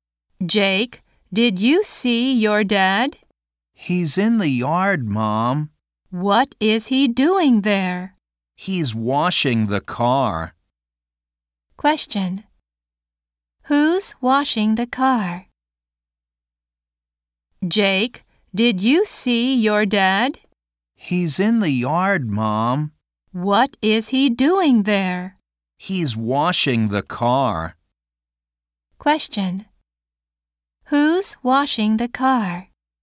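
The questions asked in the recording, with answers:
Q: Who's washing the car?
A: Jake's dad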